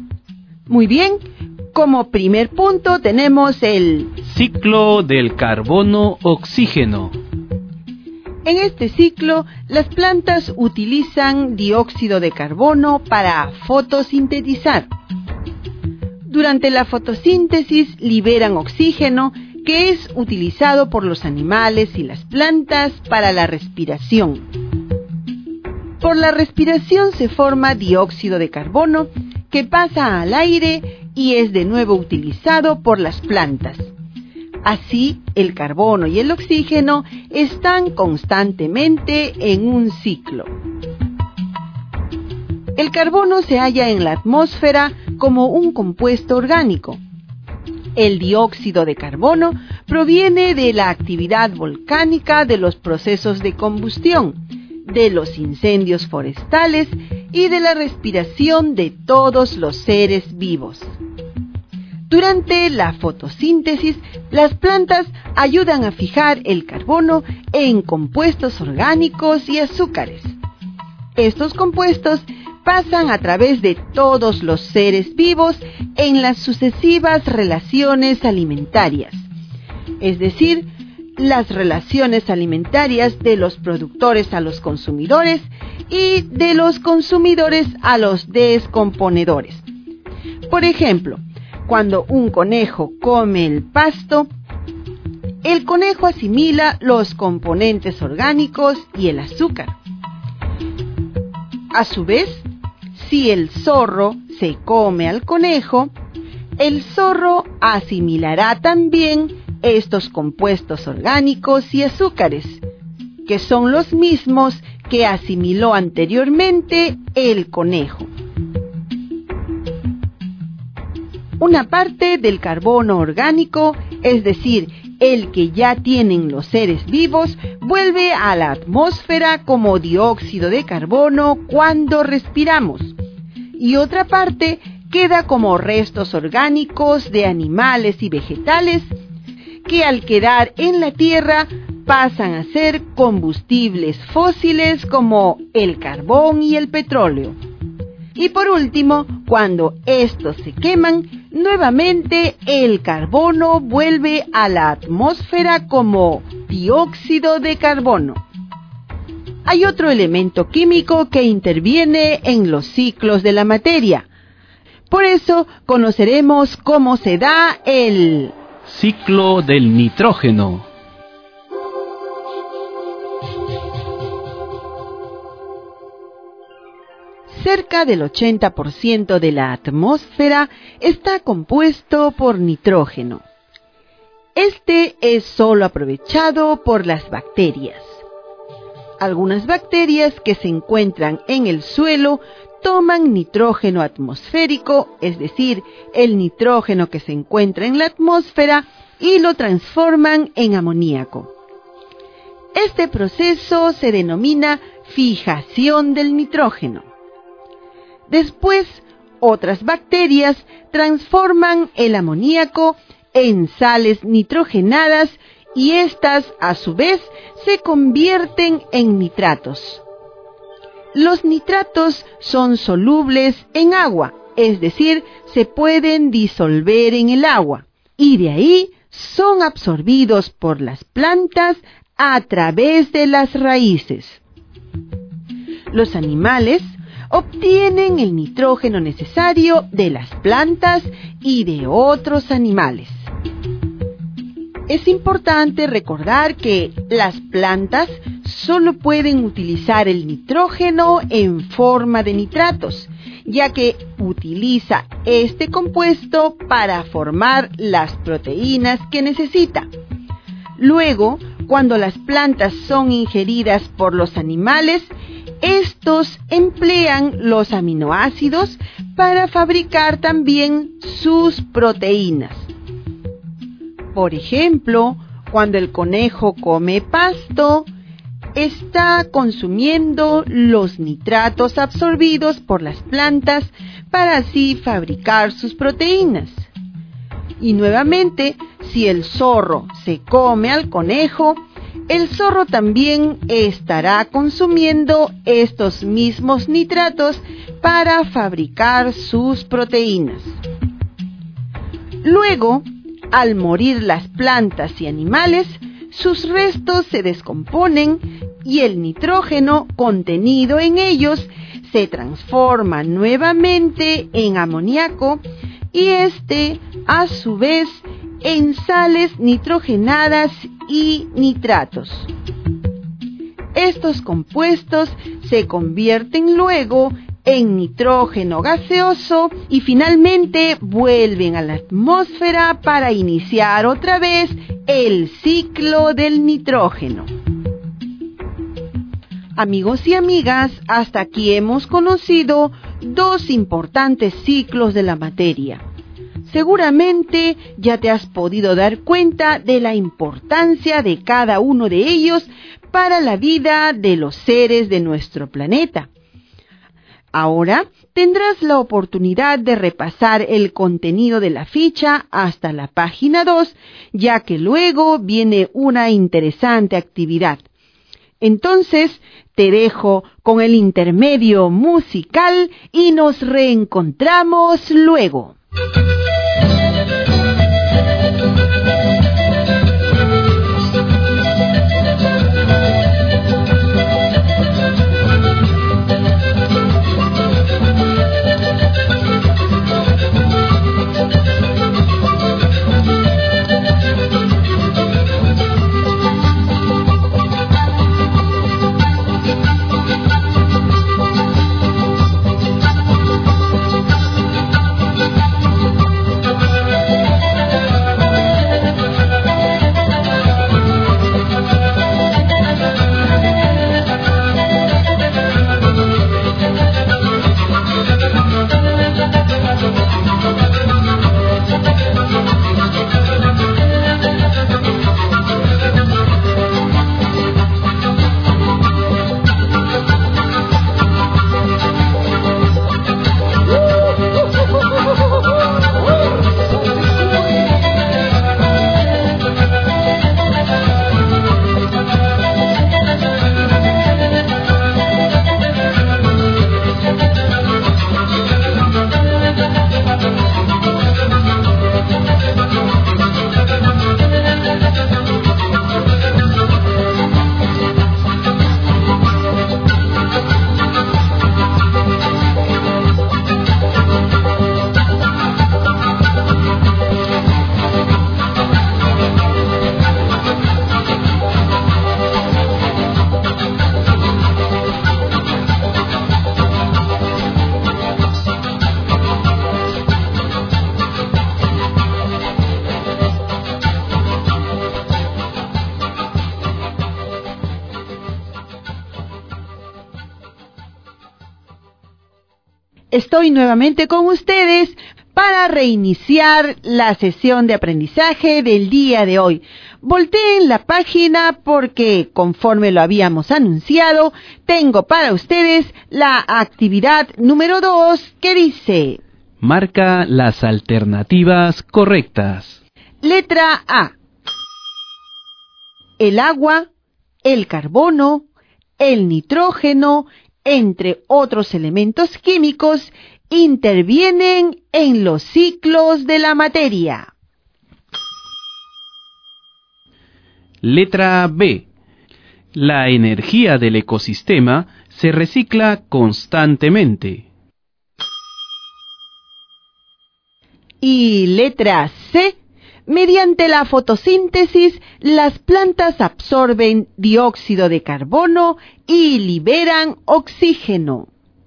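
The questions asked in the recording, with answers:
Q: el agua, el carbono, el nitrógeno, entre otros elementos químicos, intervienen en los ciclos de la materia.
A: Correcta

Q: La energía del ecosistema se recicla constantemente.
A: Incorrecta

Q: Mediante la fotosíntesis, las plantas absorben dióxido de carbono y liberan oxígeno.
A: Correcta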